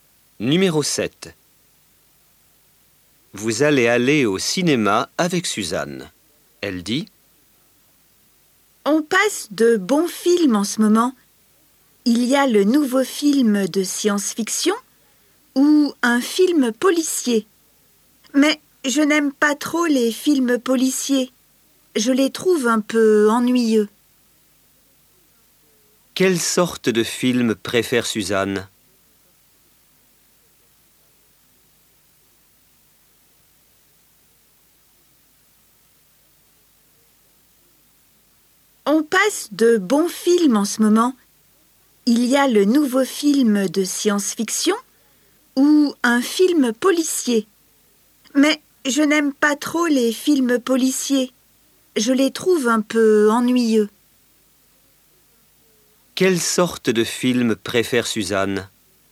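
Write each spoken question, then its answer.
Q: Quelle sorte de film préfère Suzanne?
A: Les films de science-fiction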